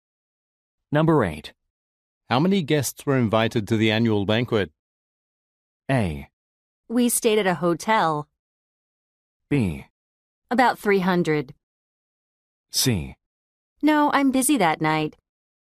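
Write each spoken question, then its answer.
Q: How many guests were invited to the annual banquet?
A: B: About 300.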